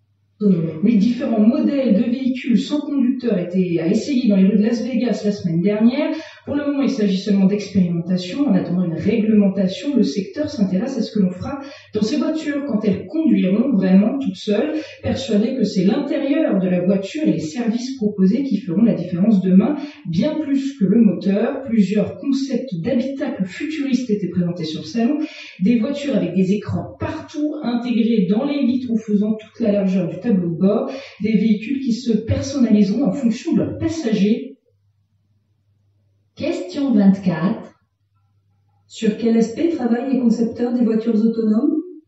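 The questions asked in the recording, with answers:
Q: Sur quel aspect travaillent les concepteurs des voitures autonomes ?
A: L'intérieur de la voiture (l'habitacle) et les services proposés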